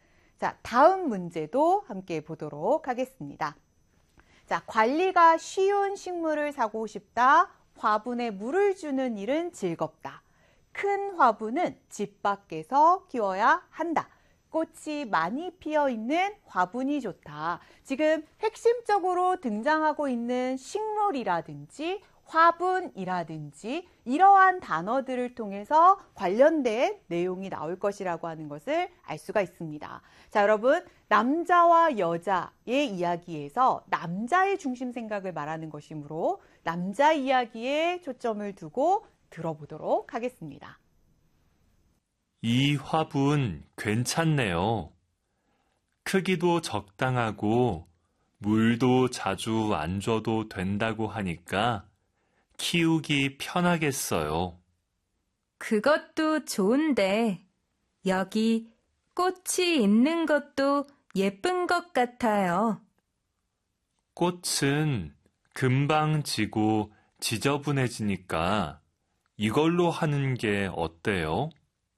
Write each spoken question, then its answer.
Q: 남자와 여자의 이야기에서 남자의 중심 생각을 말하는 것이므로 남자 이야기에 초점을 두고 들어보도록 하겠습니다.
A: 그래서 정답은 1번. 관리가 쉬운 식물을 사고 싶다.